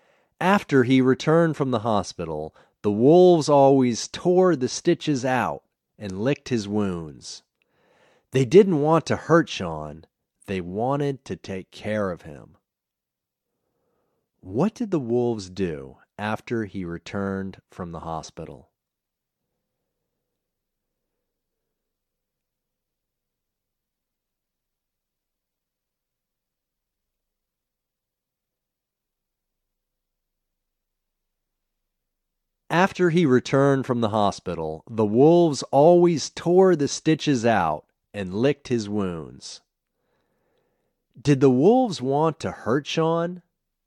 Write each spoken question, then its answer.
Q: What did the wolves do after he returned from the hospital?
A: After he returned from the hospital, the wolves always tore the stitches out and licked his wounds.

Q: Did the wolves want to hurt Sean?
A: No, the wolves didn't want to hurt Sean.